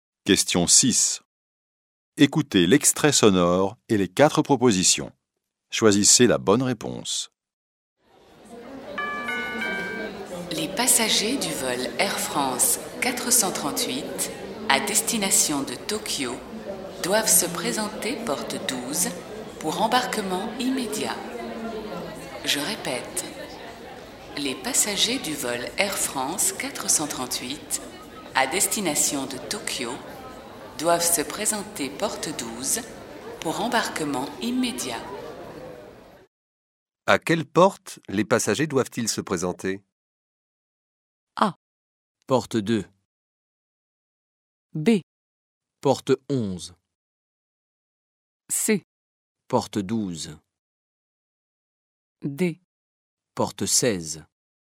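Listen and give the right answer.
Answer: C: Porte 12.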